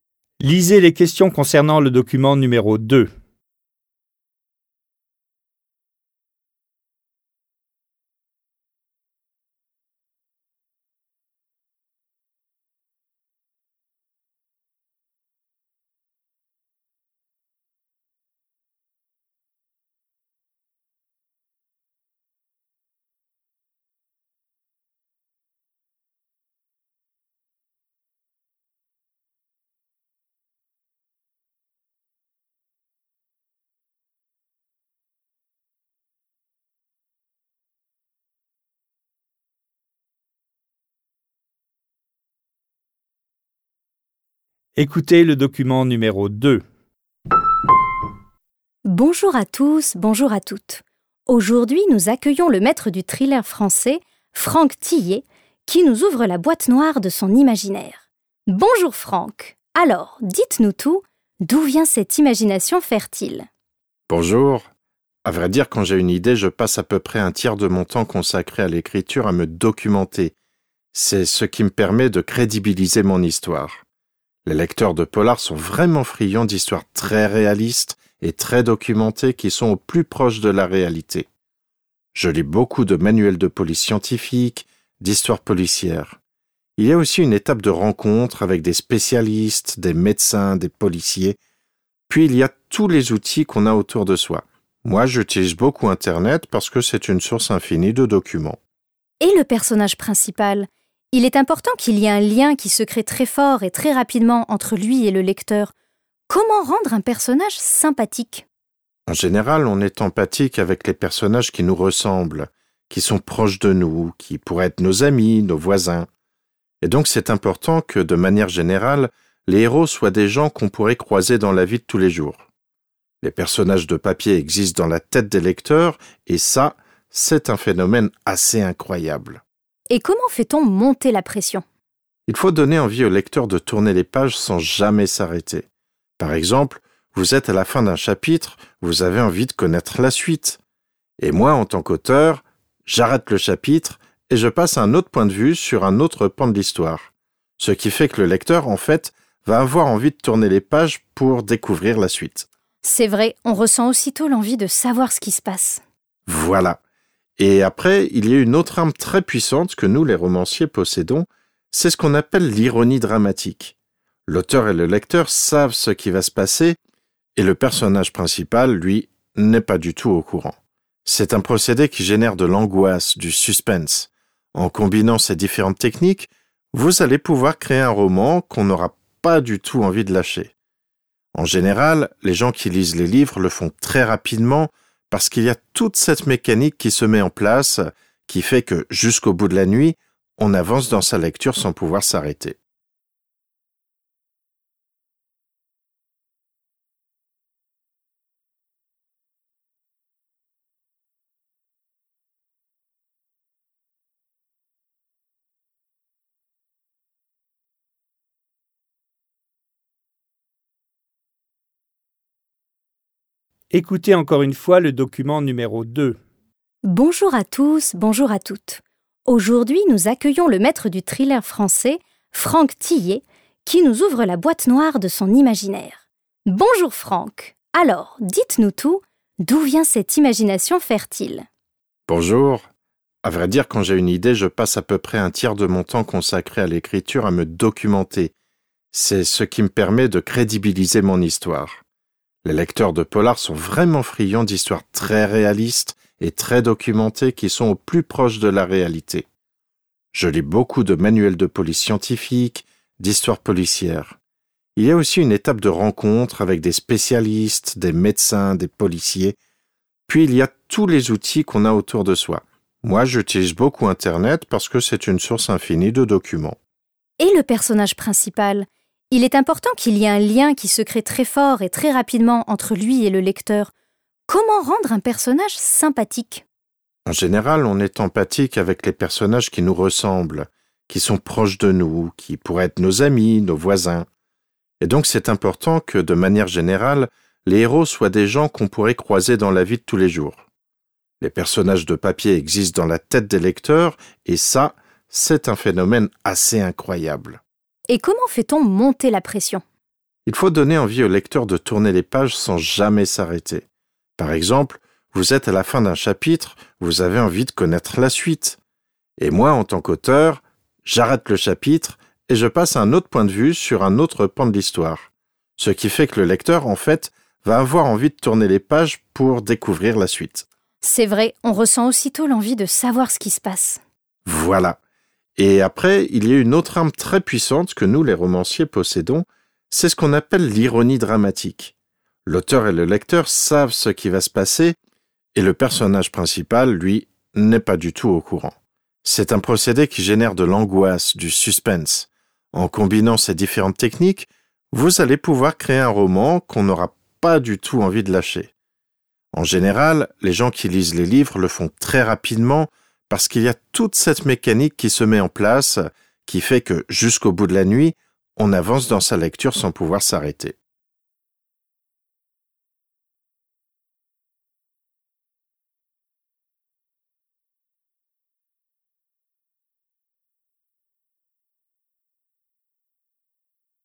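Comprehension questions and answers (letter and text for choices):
Vous allez écouter deux fois deux documents. Choisissez pour chaque phrase 2.1–2.6 la suite qui convient. Cochez la lettre A, B, C ou D correspondant à votre choix. Les phrases 2.1–2.3 se rapportent au document no 1 et les phrases 2.4–2.6 au document no 2.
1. Franck Thilliez s'appuie sur des documents pour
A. rendre sa tâche la plus facile possible.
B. choisir des personnages authentiques.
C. rédiger un manuel de police scientifique.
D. créer un roman aussi vraisemblable que possible.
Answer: D. créer un roman aussi vraisemblable que possible.

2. Le personnage principal est moins informé que le lecteur car l'auteur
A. veut que le lecteur ait de la compassion pour le héros.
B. tient à donner au lecteur la chance de prévoir le dénouement.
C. veut provoquer un sentiment d'attente inquiète chez le lecteur.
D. a ainsi la possibilité de créer un conflit entre le lecteur et le héros.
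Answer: C. veut provoquer un sentiment d'attente inquiète chez le lecteur.

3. Dans cette interview, Franck Thilliez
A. dévoile ses astuces d'écrivain.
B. explique son parcours professionnel.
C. partage son besoin fondamental d'écrire.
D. invite à se plonger dans l'univers des polars.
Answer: A. dévoile ses astuces d'écrivain.

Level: dwujęzyczny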